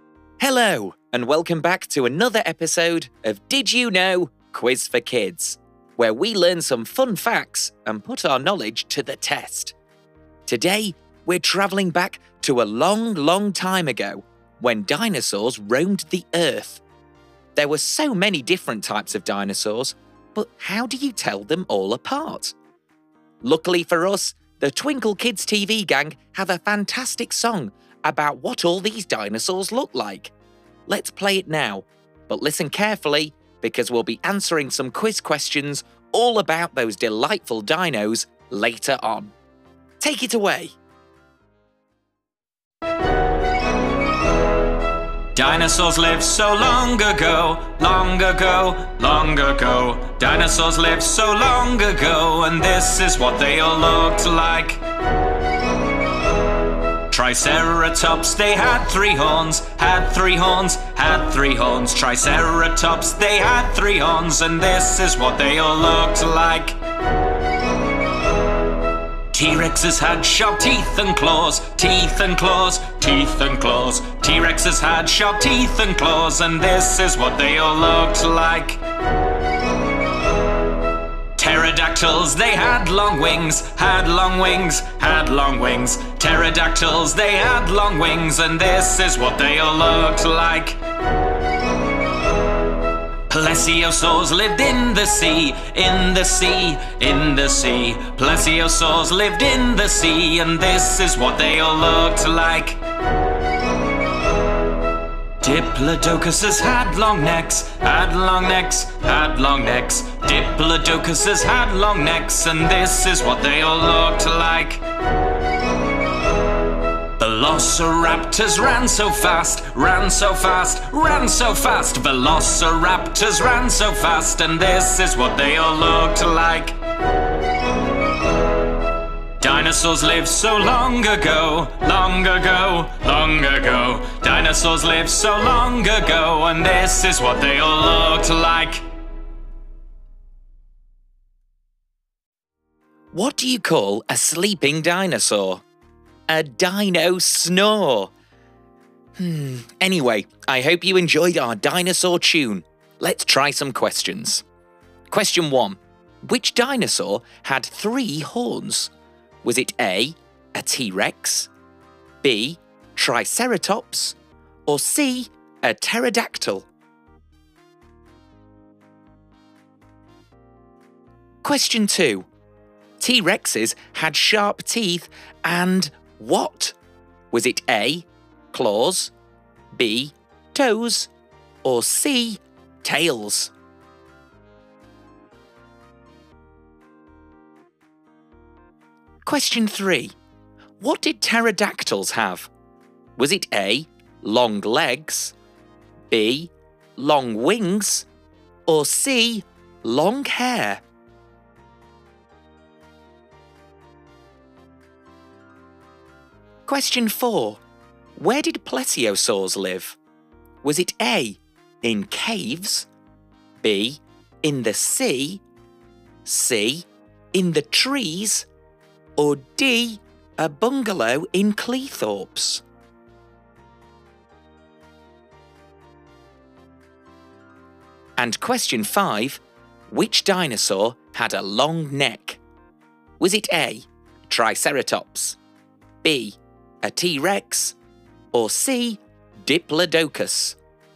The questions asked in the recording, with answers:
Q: Which dinosaur had three horns?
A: The answer is B, Triceratops.

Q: T-Rexes had sharp teeth and what?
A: The answer is A. T-Rexes had very sharp teeth and claws.

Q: What did pterodactyls have?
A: The answer was B. Pterodactyls had very long wings.

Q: Where did plesiosaurs live?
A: And the answer is B. Plesiosaurs lived in the sea.

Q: Which dinosaur had a long neck?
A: It's C. Diplodocuses had very long necks